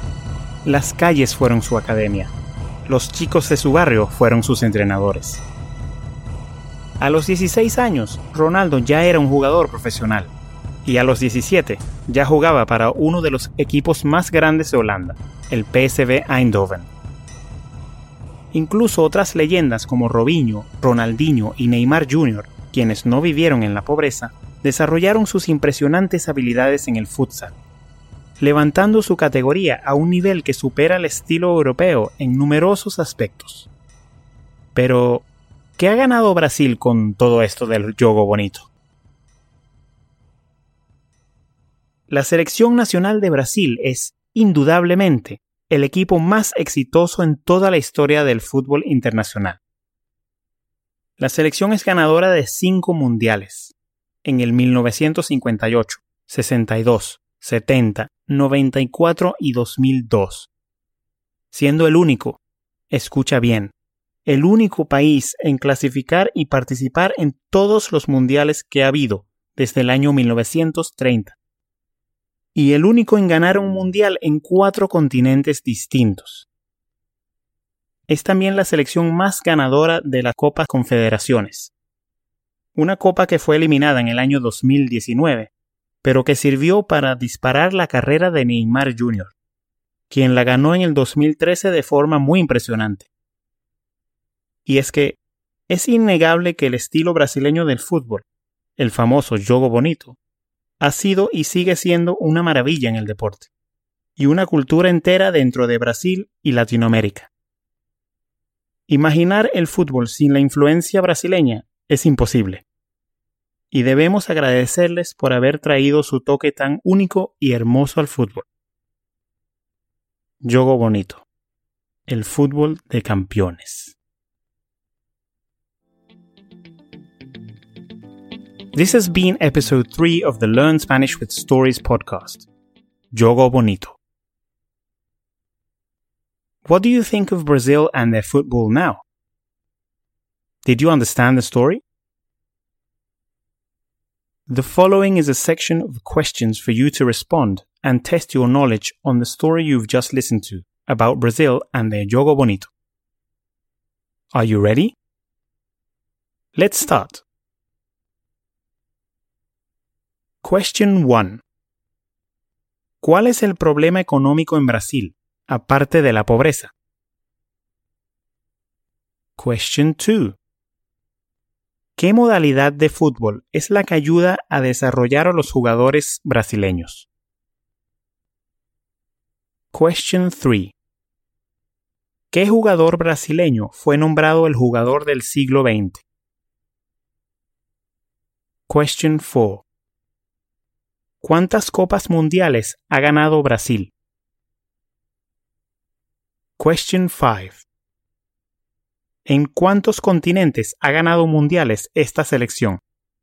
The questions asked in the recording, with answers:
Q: ¿Qué modalidad de fútbol es la que ayuda a desarrollar a los jugadores brasileños?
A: La modalidad que ayuda a desarrollar a los jugadores es el fútbol sala o el futsal.

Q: ¿Cuántas copas mundiales ha ganado Brasil?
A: Brasil ha ganado 5 copas mundiales.

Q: ¿En cuántos continentes ha ganado mundiales esta selección?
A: La selección ha ganado mundiales en 4 continentes.